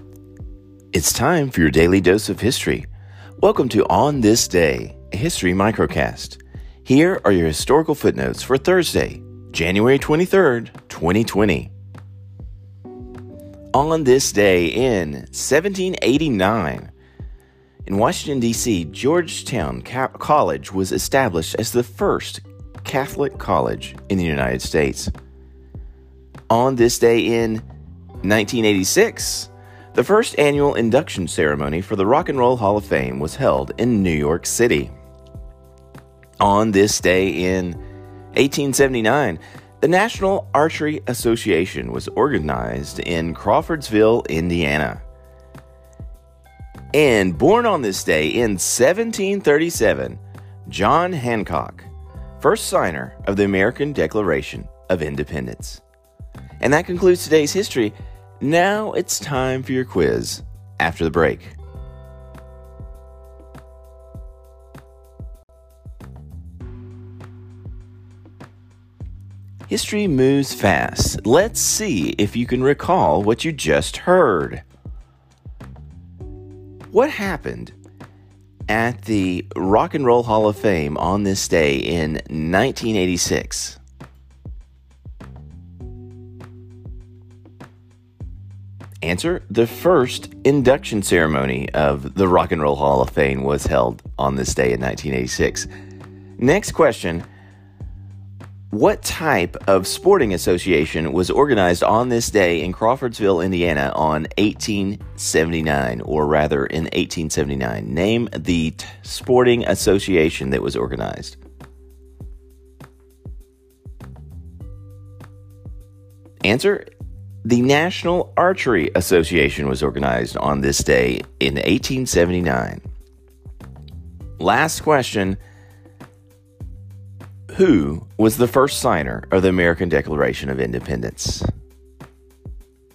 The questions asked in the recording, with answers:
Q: What happened at the Rock and Roll Hall of Fame on this day in 1986?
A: The first induction ceremony of the Rock and Roll Hall of Fame was held on this day in 1986.

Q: What type of sporting association was organized on this day in Crawfordsville, Indiana on 1879, or rather in 1879?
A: the National Archery Association was organized on this day in 1879.

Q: Who was the first signer of the American Declaration of Independence?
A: John Hancock.